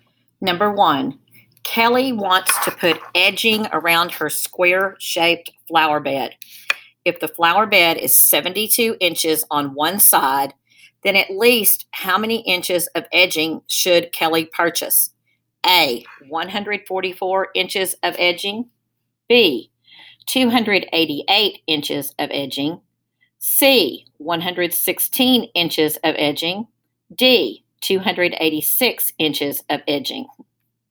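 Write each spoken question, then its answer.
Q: If the flower bed is 72 inches on one side, then at least how many inches of edging should Kelly purchase?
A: B: 288 inches of edging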